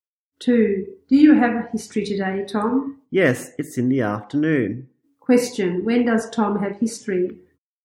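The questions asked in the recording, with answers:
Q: When does Tom have history?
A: In the afternoon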